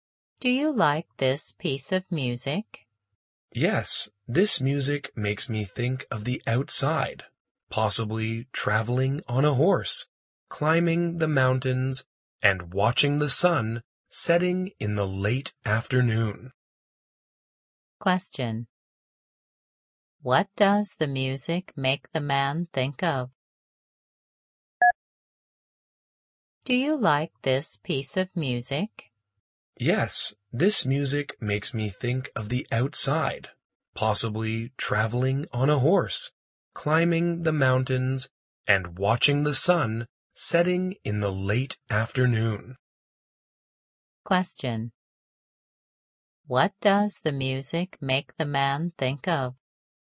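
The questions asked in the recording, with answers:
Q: What does the music make the man think of?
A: The outside, traveling on a horse, climbing mountains and watching the sunset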